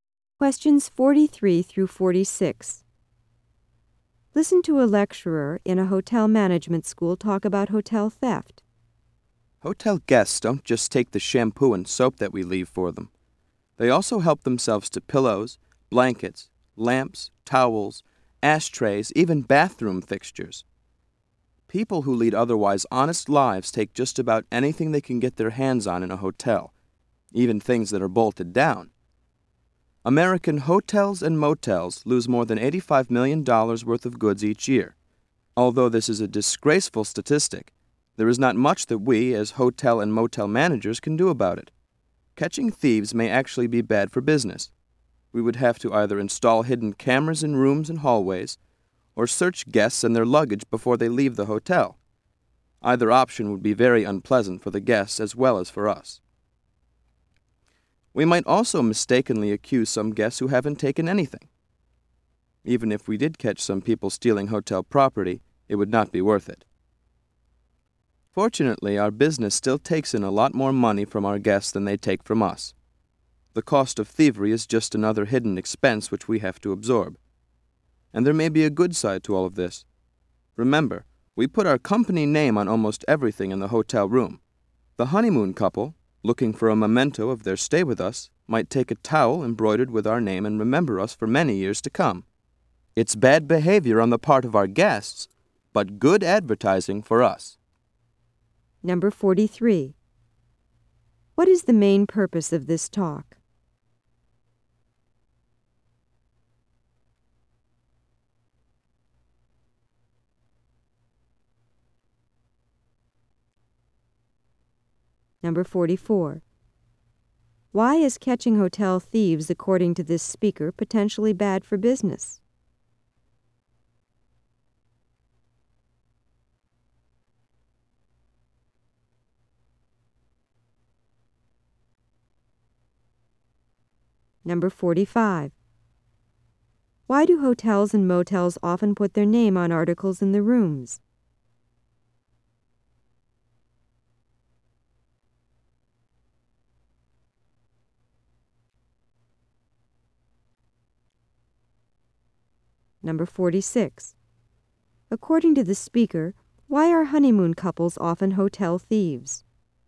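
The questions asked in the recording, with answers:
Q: What is the main purpose of this talk?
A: To discuss theft by hotel guests

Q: Why is catching hotel thieves, according to this speaker, potentially bad for business?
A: It would be unpleasant for guests, and innocent guests might be accused

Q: Why do hotels and motels often put their name on articles in the rooms?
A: As advertising

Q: According to the speaker, why are honeymoon couples often hotel thieves?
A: They want a memento of their stay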